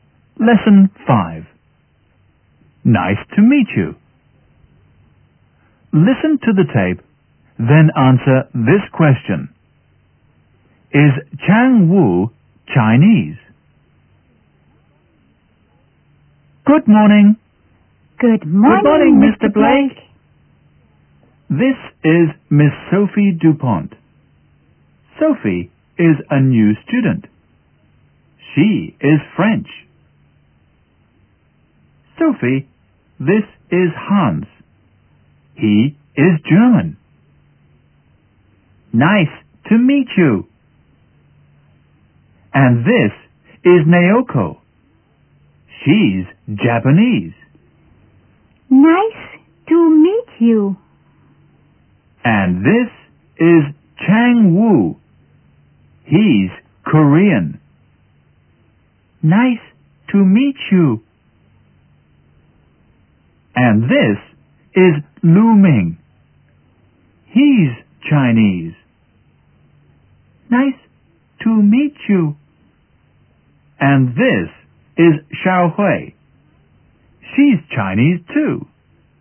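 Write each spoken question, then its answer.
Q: Is Chang Wu Chinese?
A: No, he isn't. He's Korean.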